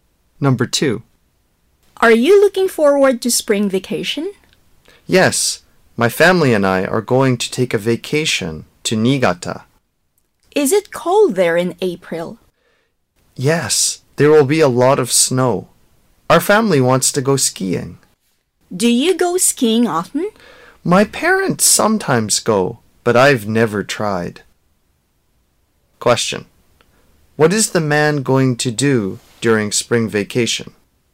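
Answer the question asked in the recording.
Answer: Go skiing in Niigata with his family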